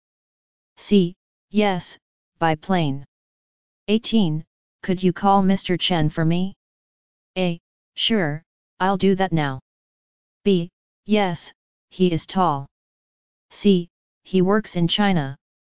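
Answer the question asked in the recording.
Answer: A: Sure, I'll do that now.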